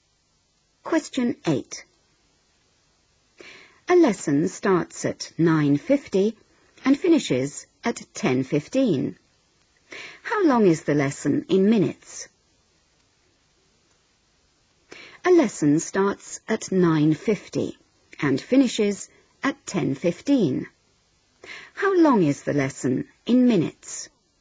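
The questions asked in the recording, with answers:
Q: How long is the lesson in minutes?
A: 25 minutes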